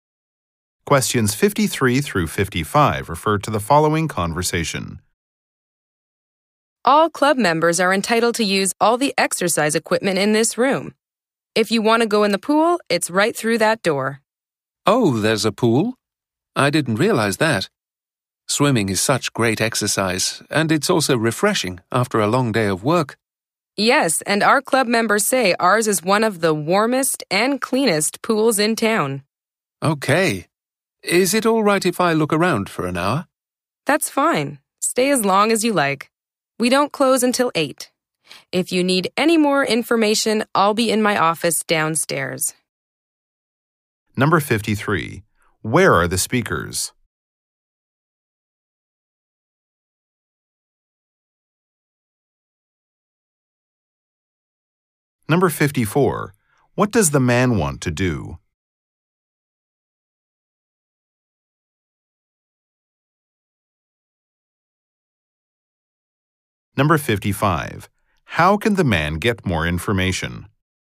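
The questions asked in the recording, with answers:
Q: Where are the speakers?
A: At a health club

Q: What does the man want to do?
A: Look around for an hour

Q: How can the man get more information?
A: Go to the office downstairs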